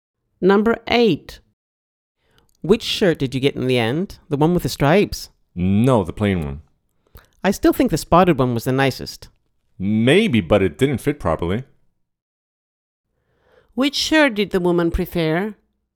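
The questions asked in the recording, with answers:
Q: Which shirt did the woman prefer?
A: The spotted one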